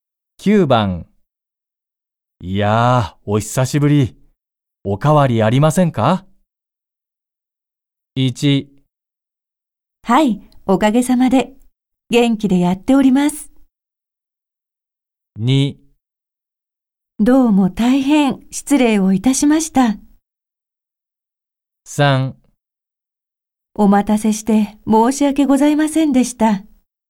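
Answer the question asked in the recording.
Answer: 1: はい、おかげさまで。元気でやっております。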